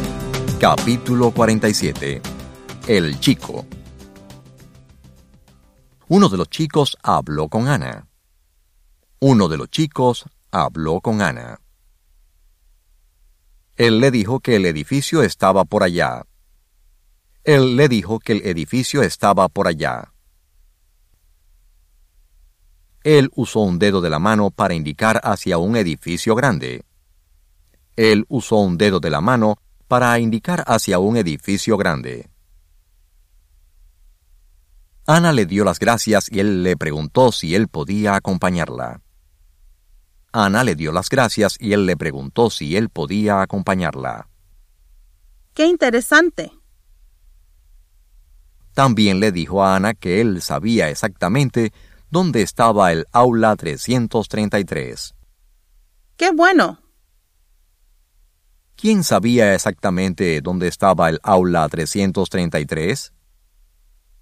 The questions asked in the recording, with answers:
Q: ¿Quién sabía exactamente dónde estaba el aula 333?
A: El chico, quien hablaba con Ana, sabía exactamente dónde estaba la aula 333.